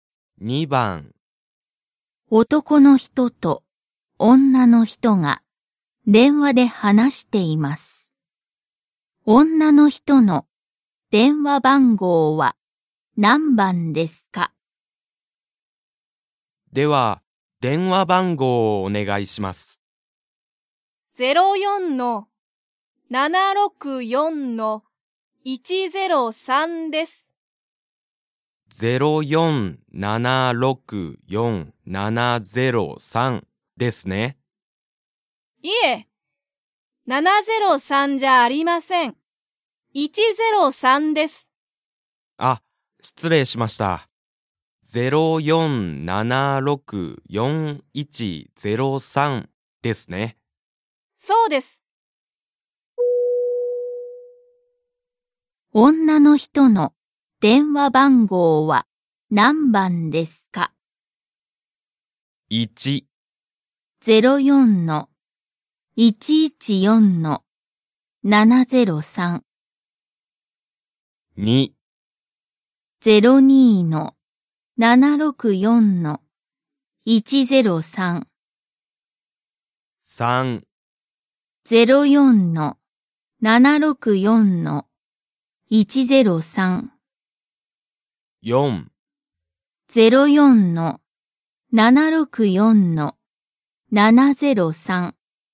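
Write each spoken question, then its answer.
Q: 女の人の電話番号は何番ですか?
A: 3: 04-764-103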